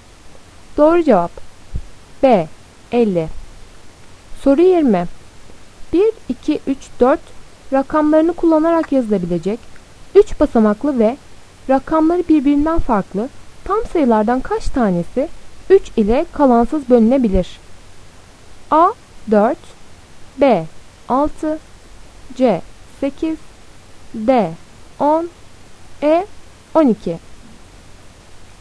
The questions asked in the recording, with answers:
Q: 1, 2, 3, 4 rakamlarını kullanarak yazılabilecek 3 basamaklı ve rakamları birbirinden farklı tam sayılardan kaç tanesi 3 ile kalansız bölünebilir?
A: Doğru cevap E. 12.